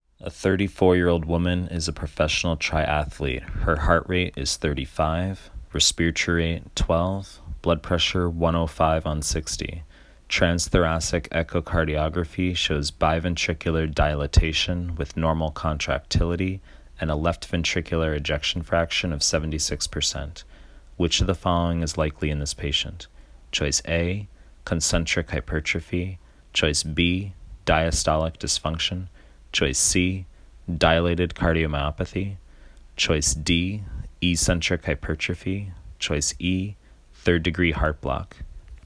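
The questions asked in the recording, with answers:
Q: Which of the following is likely in this patient?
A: D: eccentric hypertrophy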